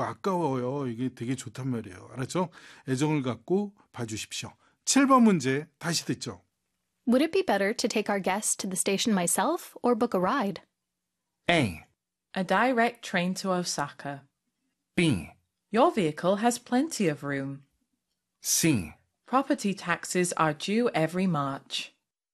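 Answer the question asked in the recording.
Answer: B: Your vehicle has plenty of room.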